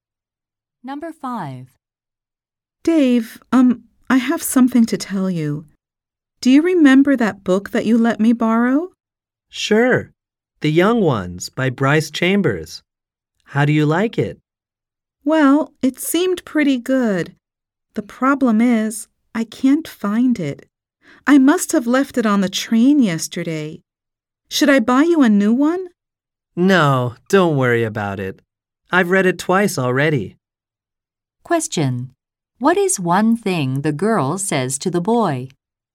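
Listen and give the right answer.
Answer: She lost his book, probably on the train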